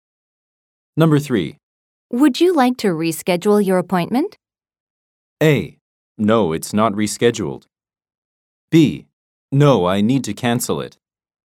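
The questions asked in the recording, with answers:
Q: Would you like to reschedule your appointment?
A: B: No, I need to cancel it.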